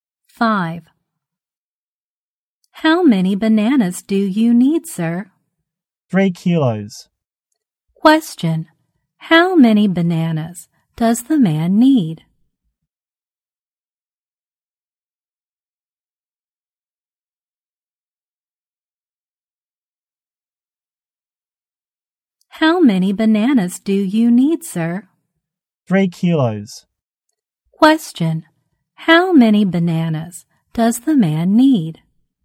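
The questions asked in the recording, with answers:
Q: how many bananas does the man need?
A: 3 kilos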